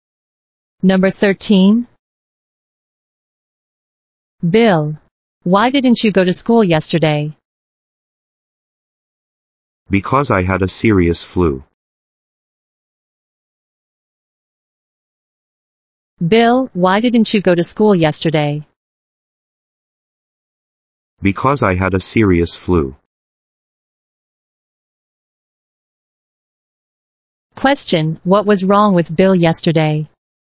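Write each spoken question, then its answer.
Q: what was wrong with Bill yesterday?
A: He had a serious flu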